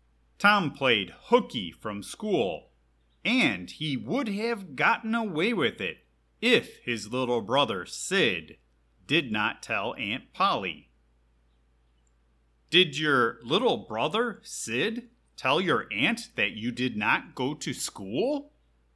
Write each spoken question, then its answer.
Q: Did your little brother, Sid, tell your aunt that you did not go to school?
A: Yes, and I would have gotten away with it if he kept his big mouth shut.